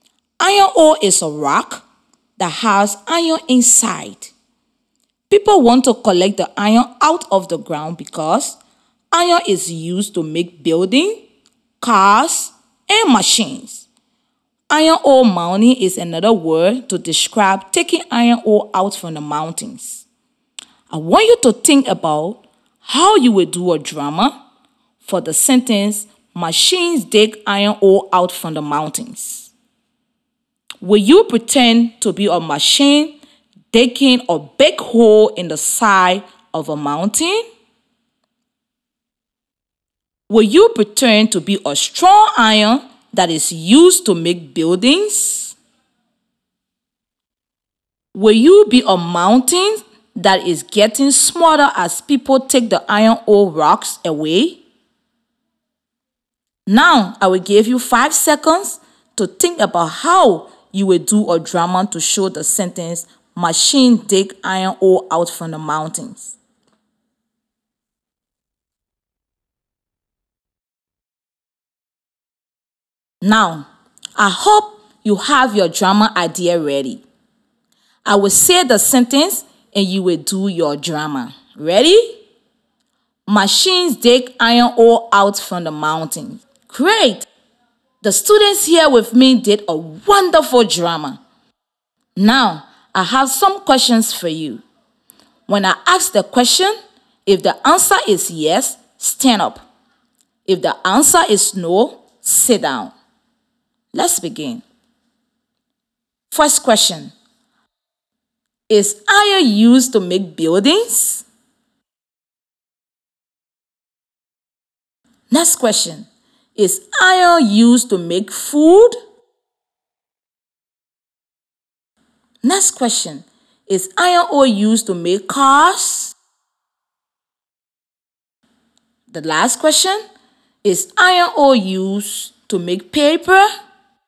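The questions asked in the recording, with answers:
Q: Is iron used to make buildings?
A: Yes

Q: Is iron used to make food?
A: No

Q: Is iron ore used to make cars?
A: Yes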